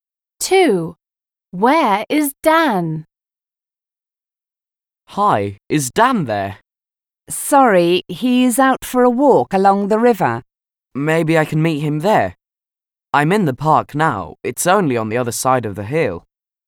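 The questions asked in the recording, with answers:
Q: Where is Dan?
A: walking along the river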